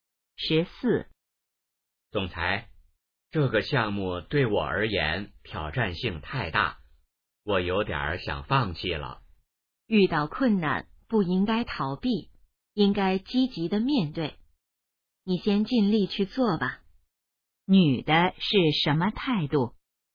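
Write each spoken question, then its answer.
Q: 女的是什么态度?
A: 鼓励他积极面对困难,不要放弃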